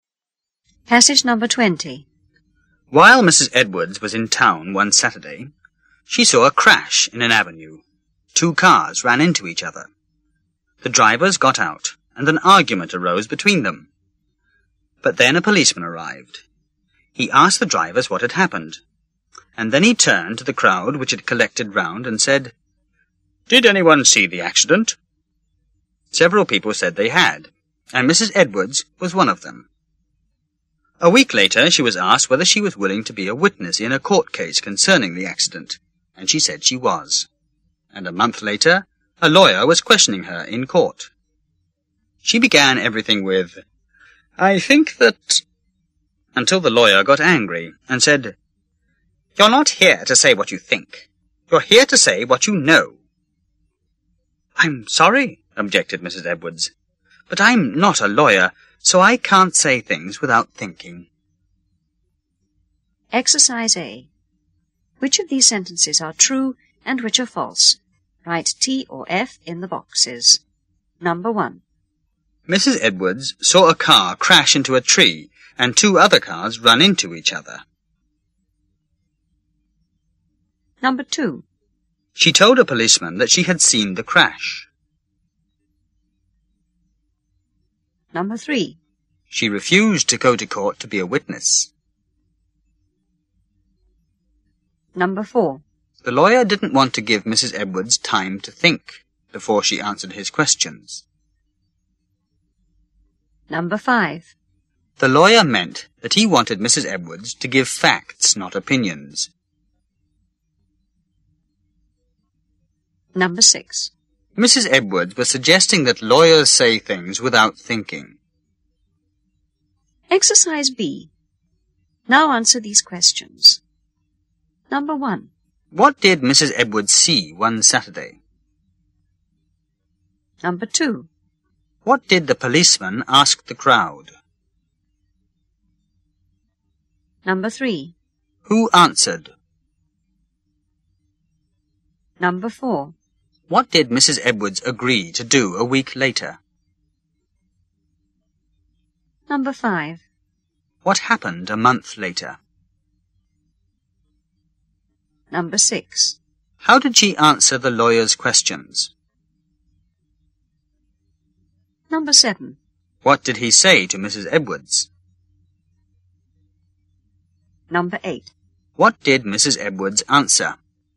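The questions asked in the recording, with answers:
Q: What did Mrs. Edwards see one Saturday?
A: A crash in an avenue: two cars ran into each other.

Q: What did the policeman ask the crowd?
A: Did anyone see the accident?

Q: Who answered?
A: Several people, including Mrs. Edwards.

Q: What did Mrs. Edwards agree to do a week later?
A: To be a witness in a court case about the accident.

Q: What happened a month later?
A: A lawyer questioned her in court.

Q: How did she answer the lawyer's questions?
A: She began everything with "I think that..."

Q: What did he say to Mrs. Edwards?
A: You're not here to say what you think. You're here to say what you know.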